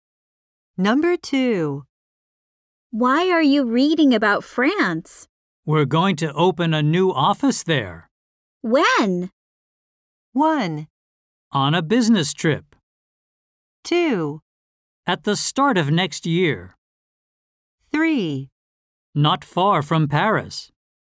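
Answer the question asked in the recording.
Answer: 2: At the start of next year.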